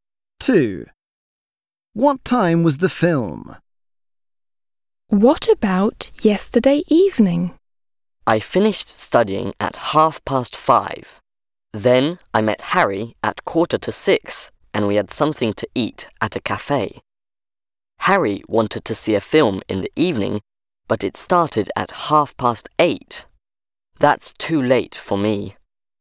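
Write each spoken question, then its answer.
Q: What time was the film?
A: 8:30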